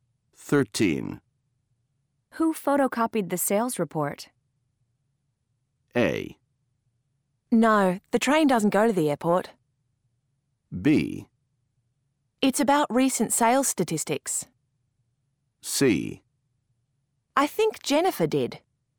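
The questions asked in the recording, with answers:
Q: Who photocopied the sales report?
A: C: I think Jennifer did.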